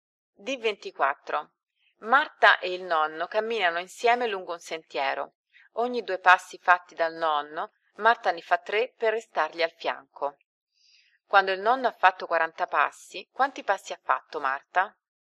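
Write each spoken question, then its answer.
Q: Quando il nonno ha fatto 40 passi, quanti passi ha fatto Marta?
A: A: 60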